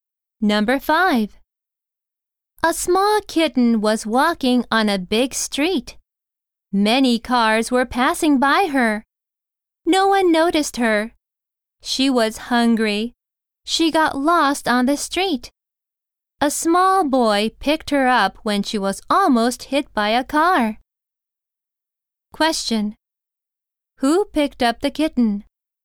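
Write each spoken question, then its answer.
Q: Who picked up the kitten?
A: A small boy.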